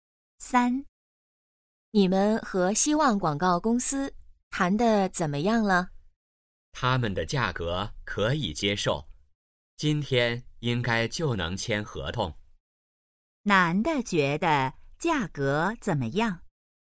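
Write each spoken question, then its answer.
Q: 男的觉得价格怎么样?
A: 可以接受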